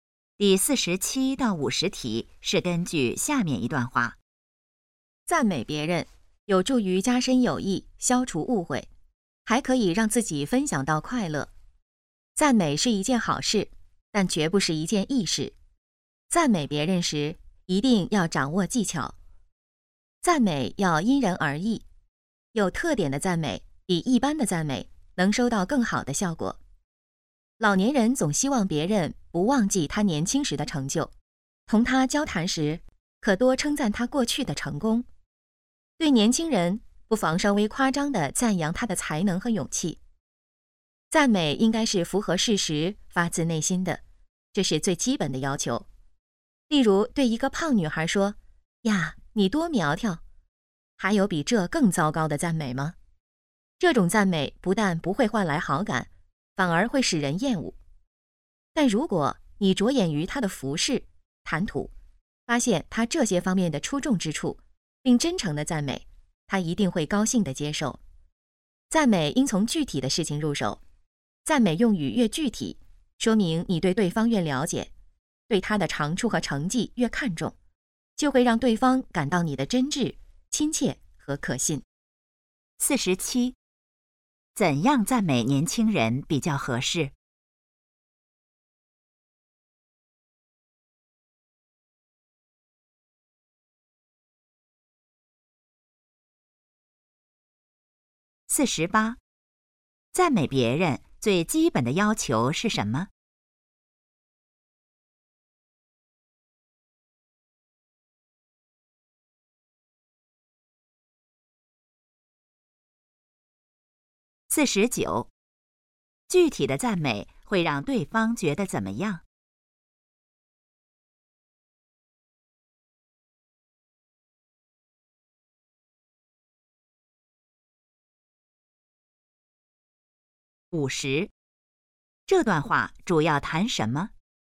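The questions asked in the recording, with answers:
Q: 怎样赞美年轻人比较合适?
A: 稍微夸张地赞扬他的才能和勇气

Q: 赞美别人最基本的要求是什么?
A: 符合事实,发自内心

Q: 具体的赞美会让对方觉得怎么样?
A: 真挚、亲切和可信

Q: 这段话主要谈什么?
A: 赞美别人的技巧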